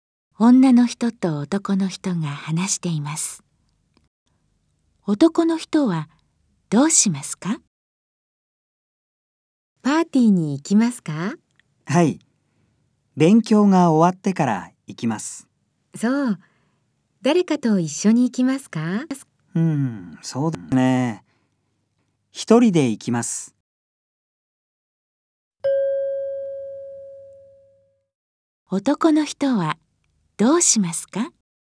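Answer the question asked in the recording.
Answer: 勉強が終わってから、一人でパーティーに行く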